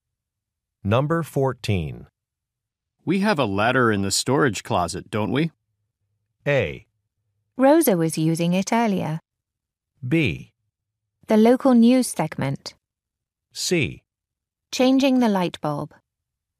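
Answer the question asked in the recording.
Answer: A: Rosa was using it earlier.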